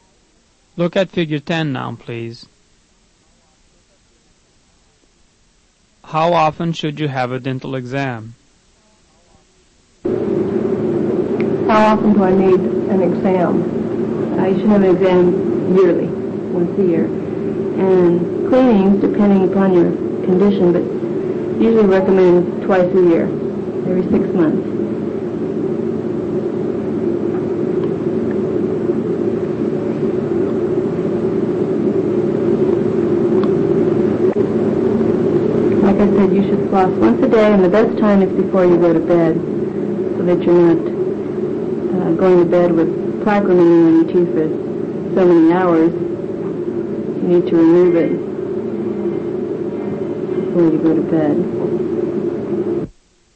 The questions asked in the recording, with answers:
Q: How often should you have a dental exam?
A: The answer is letter C, yearly.